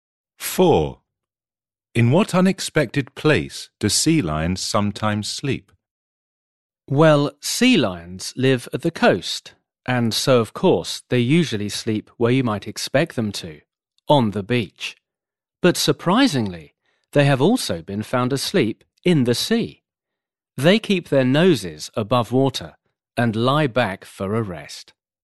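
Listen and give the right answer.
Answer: In the sea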